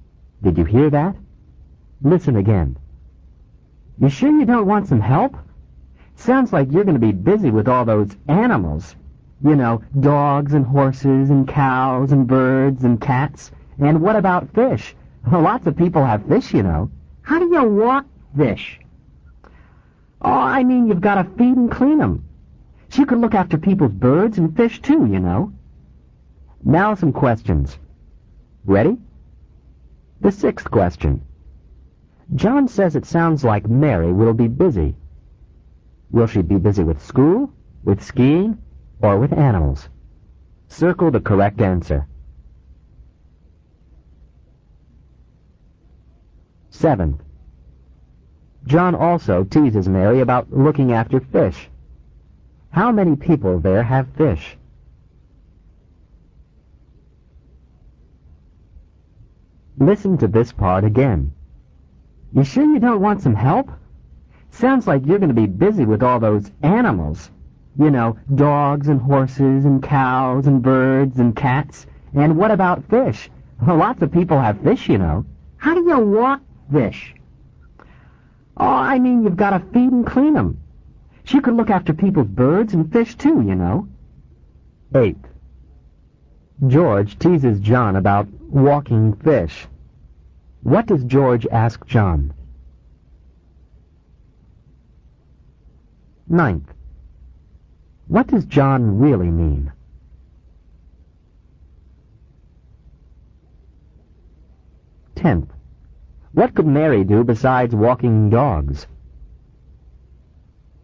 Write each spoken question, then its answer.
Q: Will she be busy with school, with skiing, or with animals?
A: For the 6th question, you should have circled C, animals.

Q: How many people there have fish?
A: For the 7th, lots of people do.

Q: What does George ask John?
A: 8. How do you walk fish?

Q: What does John really mean?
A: You have to feed the fish and clean their tanks.

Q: What could Mary do besides walking dogs?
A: 10. She could look after people's, people's, birds and fish.